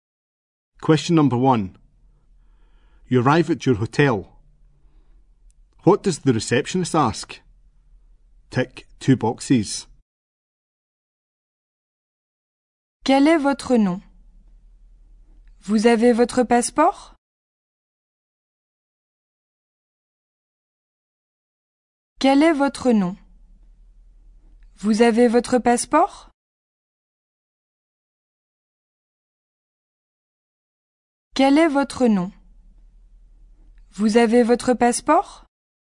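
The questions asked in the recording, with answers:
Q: What does the receptionist ask?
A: Your name and whether you have your passport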